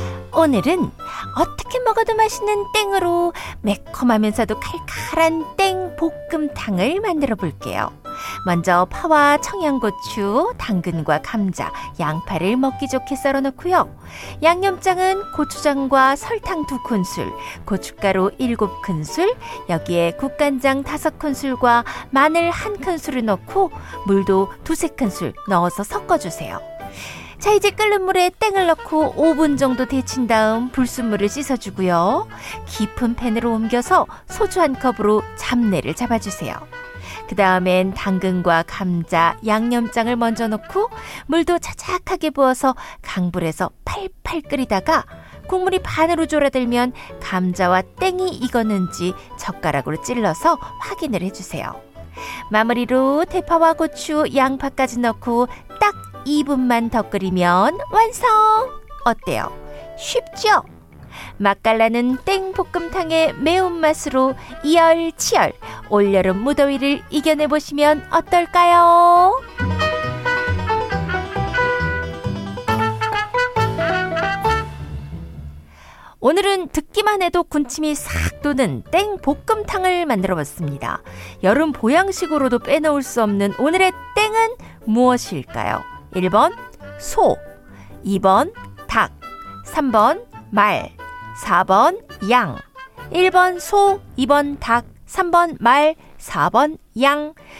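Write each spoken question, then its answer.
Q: 여름 보양식으로도 빼놓을 수 없는 오늘의 땡은 무엇일까요?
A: 2: 닭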